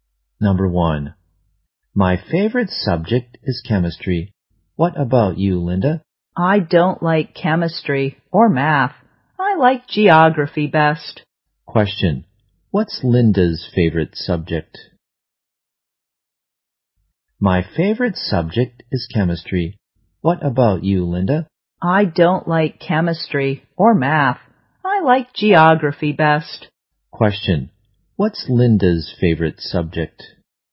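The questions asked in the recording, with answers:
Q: what's Linda's favorite subject?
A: Geography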